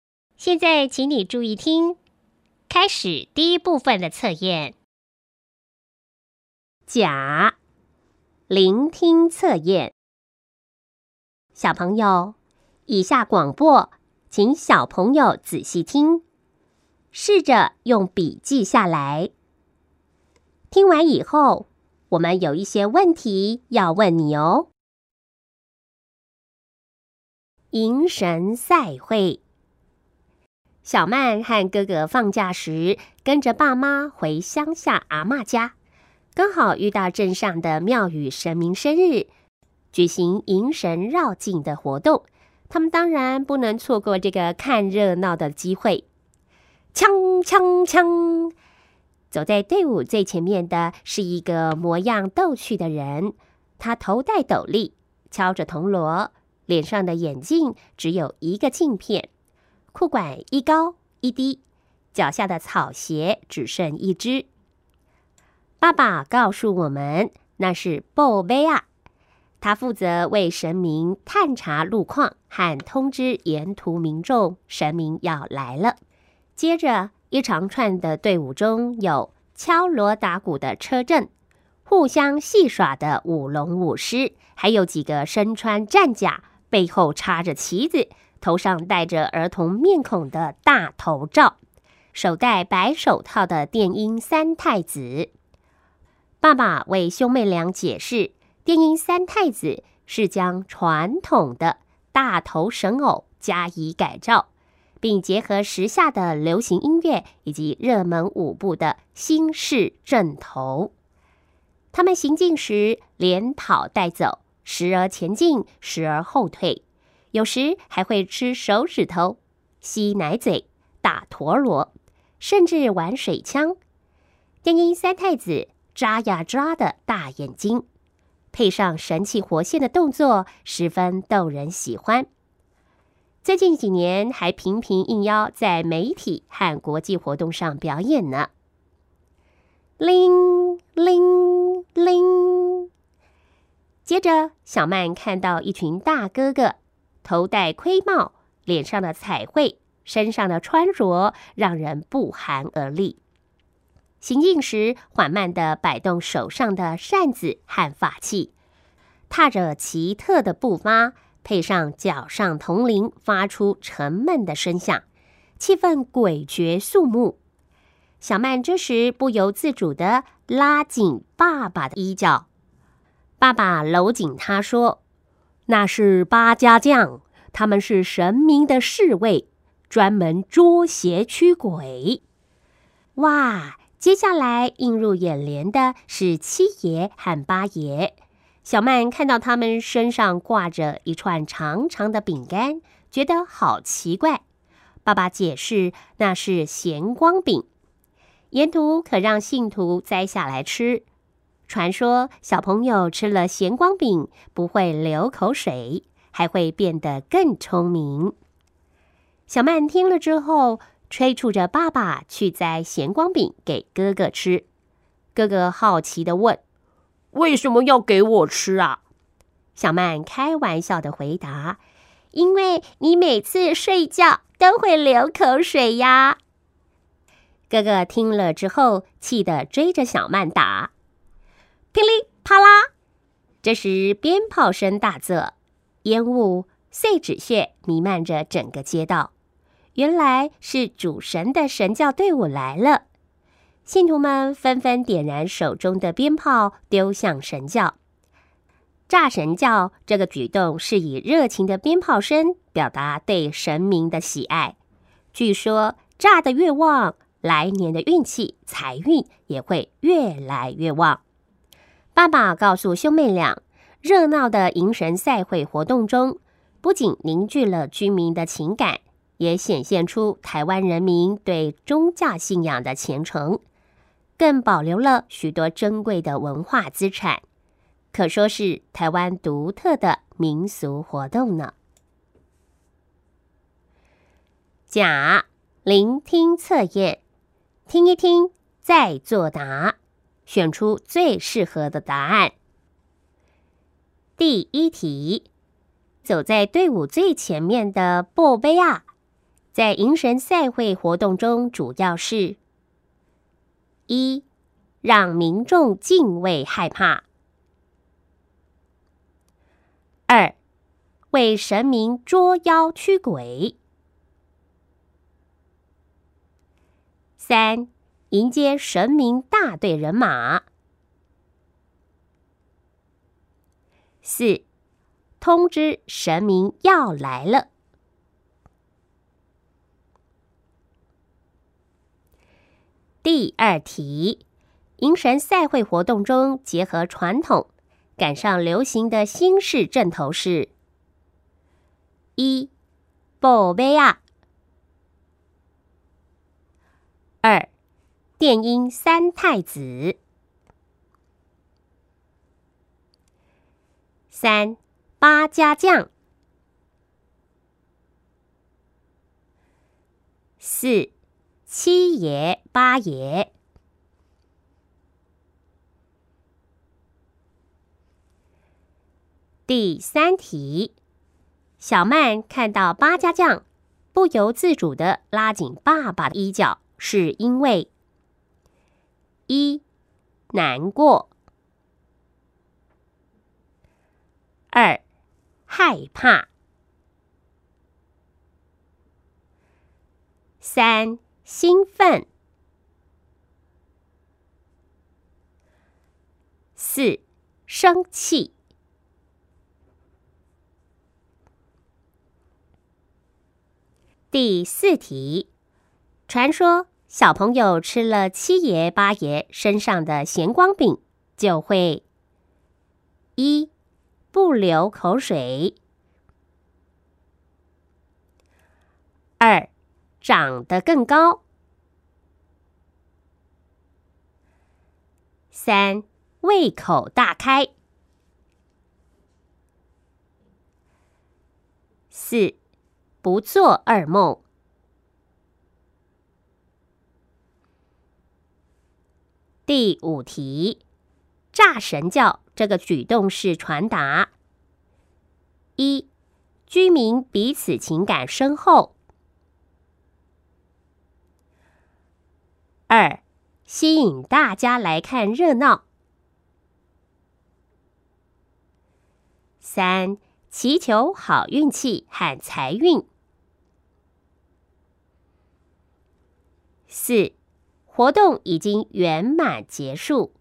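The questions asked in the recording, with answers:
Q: 走在队伍最前面的布杯啊,在迎神赛会活动中主要是:一,让民众敬畏害怕;二,为神明捉妖驱鬼;三,迎接神明大队人马;四,通知神明要来了。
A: 四:通知神明要来了

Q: 迎神赛会活动中结合传统,赶上流行的新式阵头是:一,布杯啊;二,电音三太子;三,八家将;四,七爷八爷;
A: 二:电音三太子

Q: 小曼看到八家将,不由自主地拉紧爸爸的衣角,是因为:一,难过;二,害怕;三,兴奋;四,生气。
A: 二:害怕

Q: 传说小朋友吃了七爷八爷身上的咸光饼,就会:一,不流口水;二,长得更高;三,胃口大开;四,不做噩梦。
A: 一:不流口水

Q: 炸神教这个举动是传达:一,居民彼此情感深厚;二,吸引大家来看热闹;三,祈求好运气和财运;四,活动已经圆满结束。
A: 三:祈求好运气和财运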